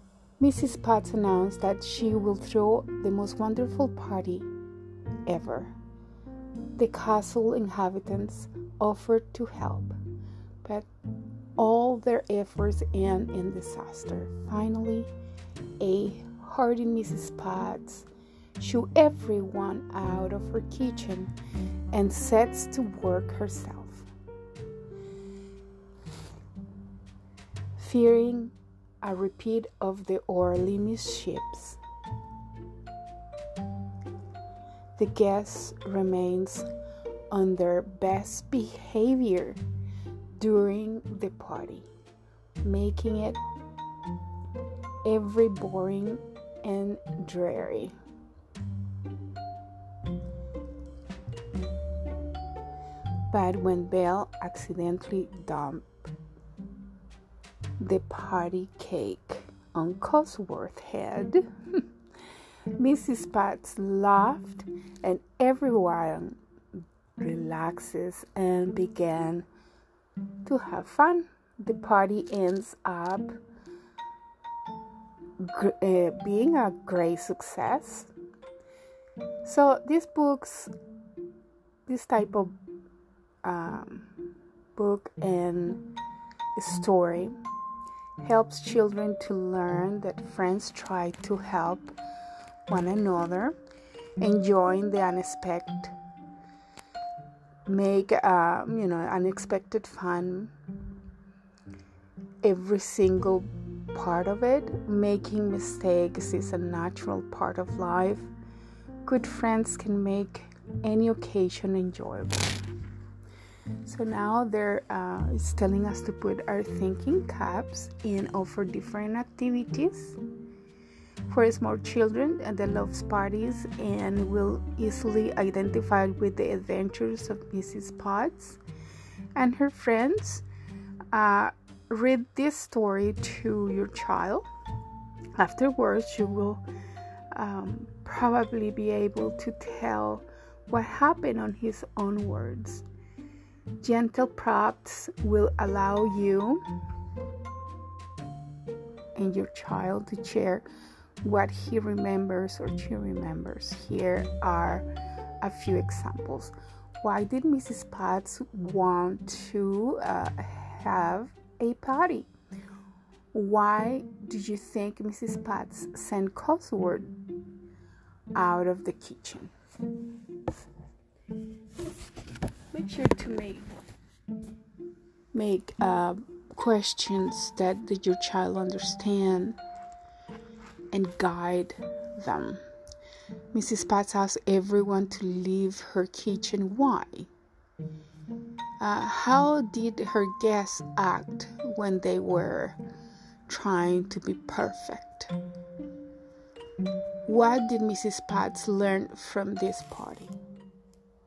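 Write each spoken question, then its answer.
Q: How did her guests act when they were trying to be perfect?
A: They stayed on their best behavior, which made the party boring and dreary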